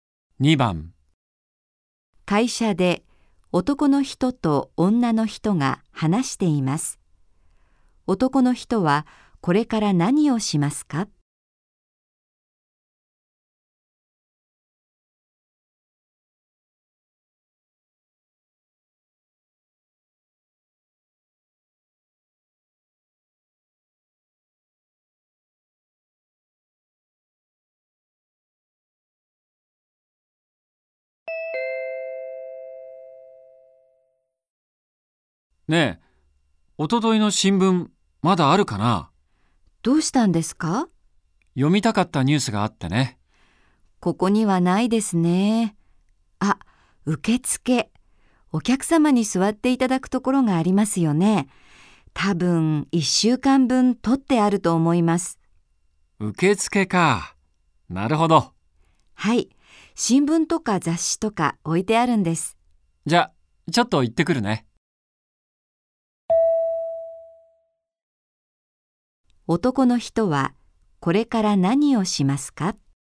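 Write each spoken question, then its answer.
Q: 男の人はこれから何をしますか?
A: 受付へ行って、おとといの新聞を探す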